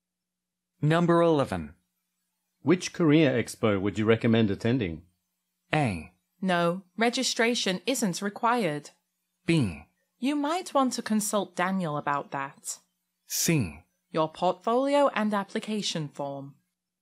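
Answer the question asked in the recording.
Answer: B: You might want to consult Daniel about that.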